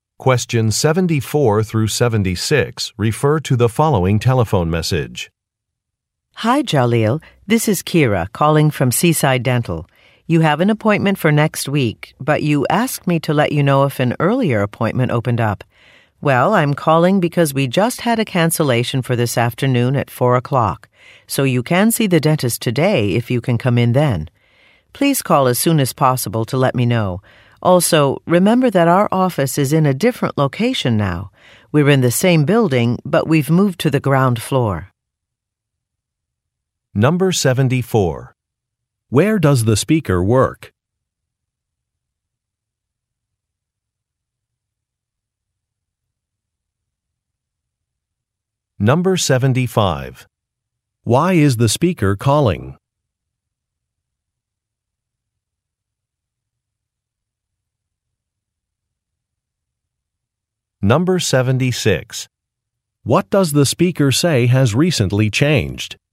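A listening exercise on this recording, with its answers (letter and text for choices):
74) Where does the speaker work?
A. At a dental office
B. At a laboratory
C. At a real estate firm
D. At an employment agency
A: A. At a dental office

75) Why is the speaker calling?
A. To give driving directions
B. To offer a different appointment time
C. To explain some billing information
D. To discuss some test results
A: B. To offer a different appointment time

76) What does the speaker say has recently changed?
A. A registration requirement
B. A fee schedule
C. A business location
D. A staff member's hours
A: C. A business location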